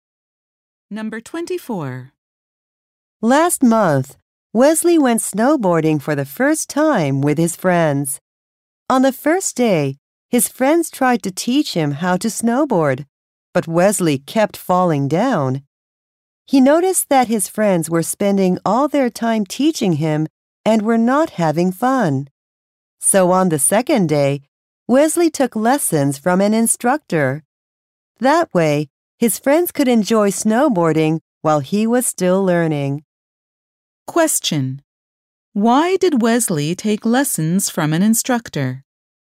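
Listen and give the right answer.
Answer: So his friends could enjoy snowboarding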